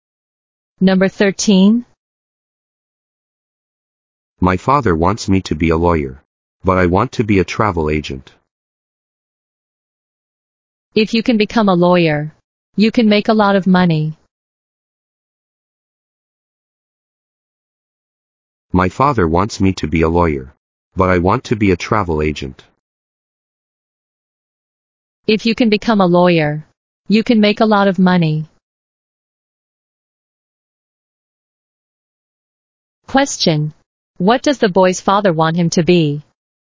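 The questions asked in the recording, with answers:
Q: What does the boy's father want him to be?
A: A lawyer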